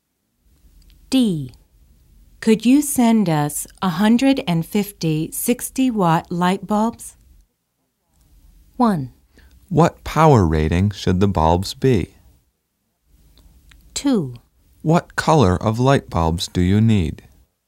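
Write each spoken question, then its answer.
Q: Could you send us 150 60-watt light bulbs?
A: 2: What color of light bulbs do you need?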